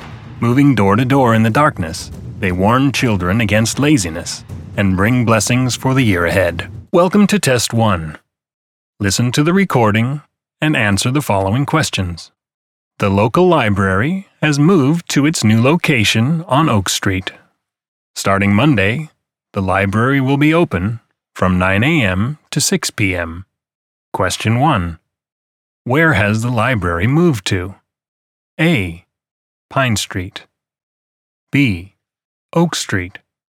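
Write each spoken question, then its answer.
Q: Where has the library moved to?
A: B: Oak Street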